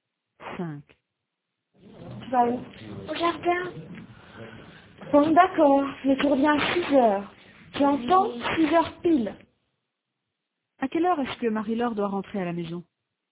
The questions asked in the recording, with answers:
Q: À quelle heure est-ce que Marie-Laure doit rentrer à la maison?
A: À 6h. 6h pile.